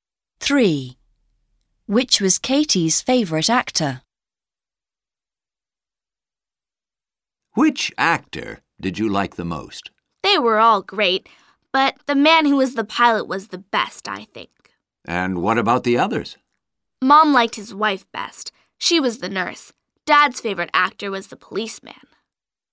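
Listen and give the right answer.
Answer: the pilot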